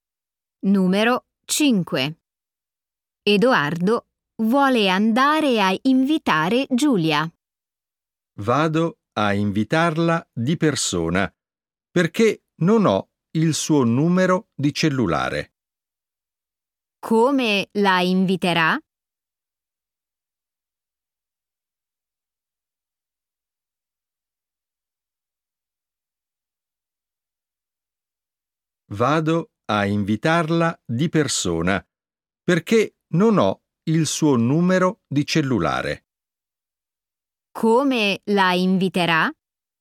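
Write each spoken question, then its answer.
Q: Come la inviterà?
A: di persona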